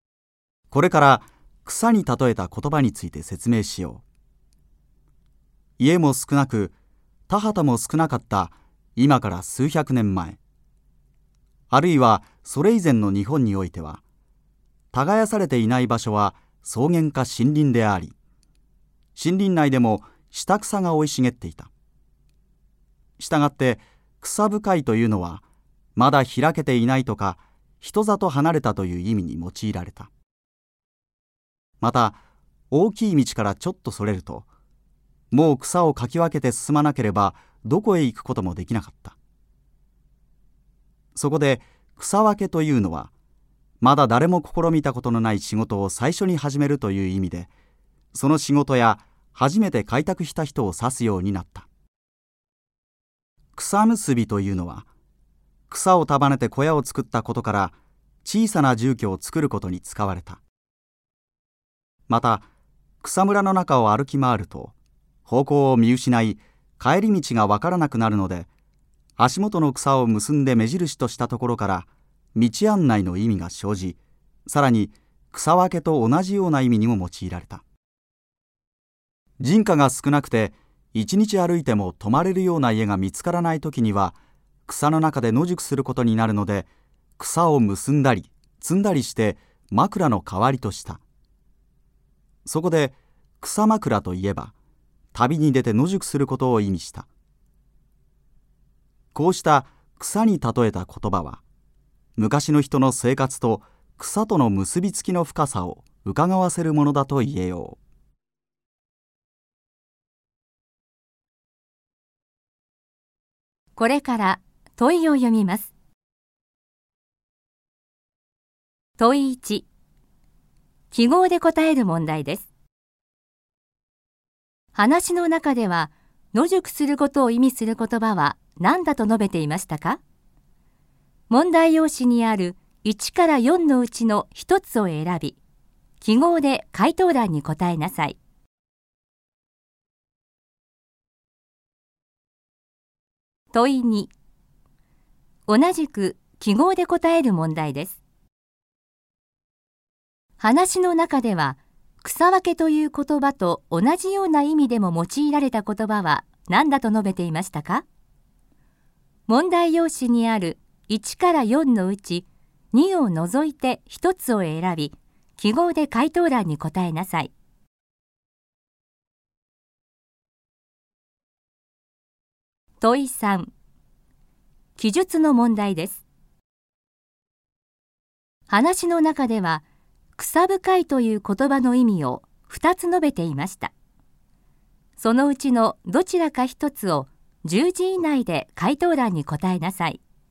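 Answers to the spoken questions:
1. 草枕
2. 草結び
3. まだ開けていない(または人里離れた)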